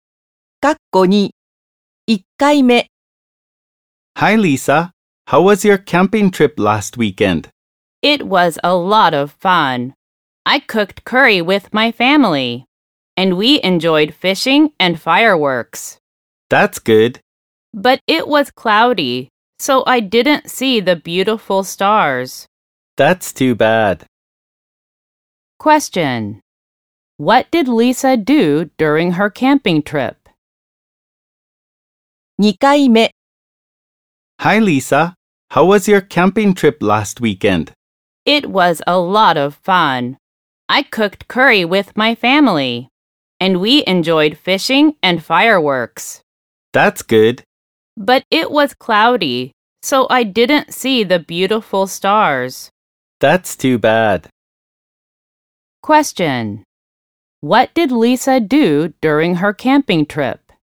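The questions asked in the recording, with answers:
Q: What did Lisa do during her camping trip?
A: She cooked curry with her family and enjoyed fishing and fireworks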